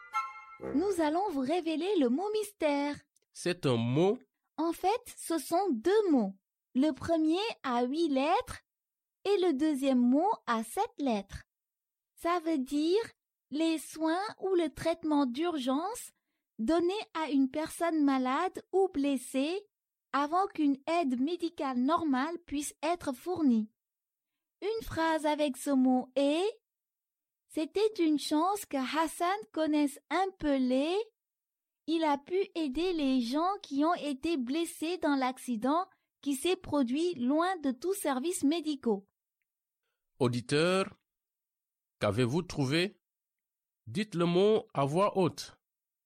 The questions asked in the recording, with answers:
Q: Auditeur, qu'avez-vous trouvé?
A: Le mot mystère d'aujourd'hui est premier secours.